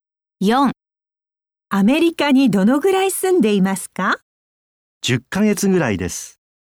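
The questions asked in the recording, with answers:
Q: アメリカにどのぐらい住んでいますか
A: 10ヶ月ぐらい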